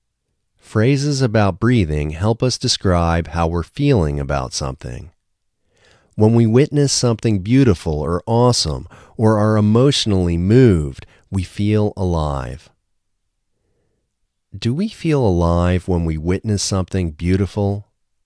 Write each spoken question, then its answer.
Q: Do we feel alive when we witness something beautiful?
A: Yes, we feel alive when we witness something beautiful.